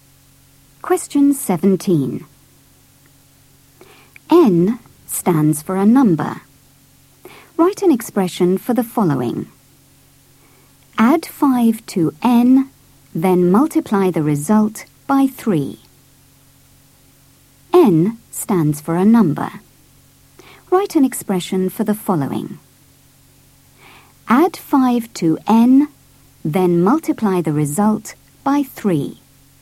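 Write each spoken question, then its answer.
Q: Add 5 to N, then multiply the result by 3.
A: 3(N + 5)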